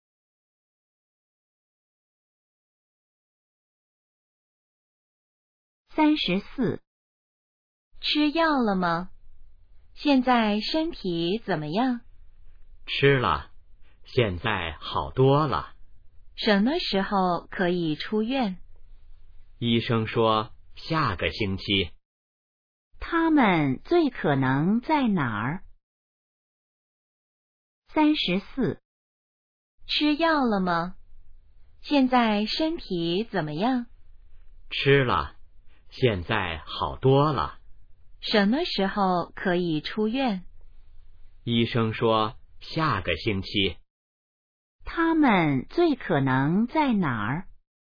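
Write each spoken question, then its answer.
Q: 他们最可能在哪儿?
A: 医院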